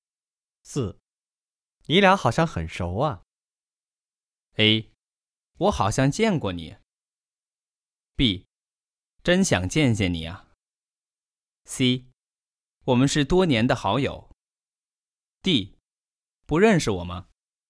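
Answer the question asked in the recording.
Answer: C: 我们是多年的好友。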